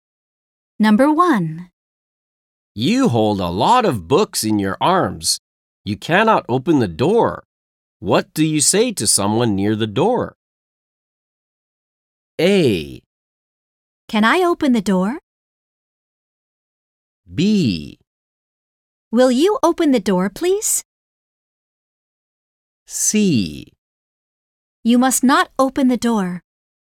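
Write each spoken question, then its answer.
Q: What do you say to someone near the door?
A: B: Will you open the door, please?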